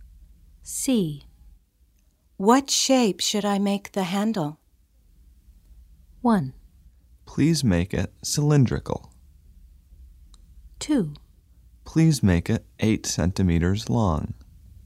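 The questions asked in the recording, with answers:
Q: What shape should I make the handle?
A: 1: Please make it cylindrical.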